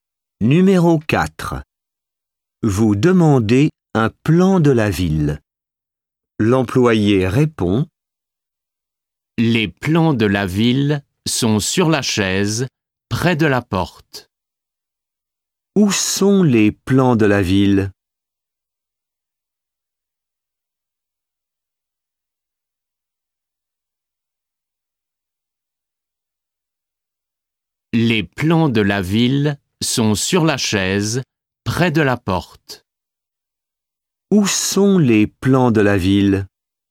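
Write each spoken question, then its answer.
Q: Où sont les plans de la ville?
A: Sur la chaise, près de la porte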